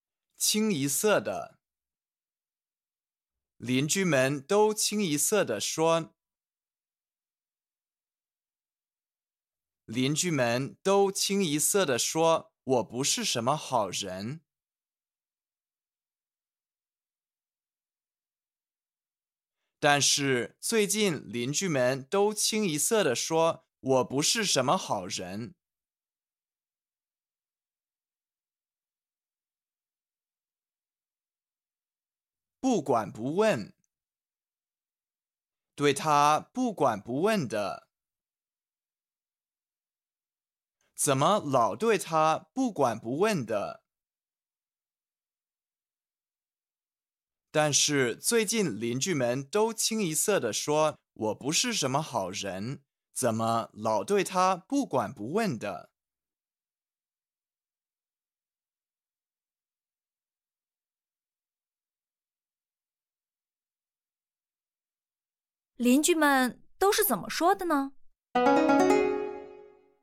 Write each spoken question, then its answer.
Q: 邻居们都是怎么说的呢?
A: 但是最近邻居们都清一色的说,我不是什么好人,怎么老对他不管不问的?